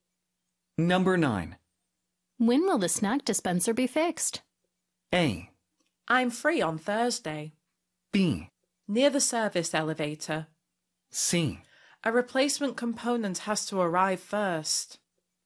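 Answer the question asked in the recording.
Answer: C: A replacement component has to arrive first.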